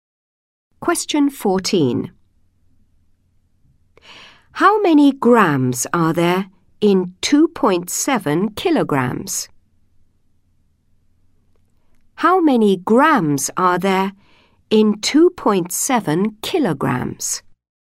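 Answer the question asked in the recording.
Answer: 2700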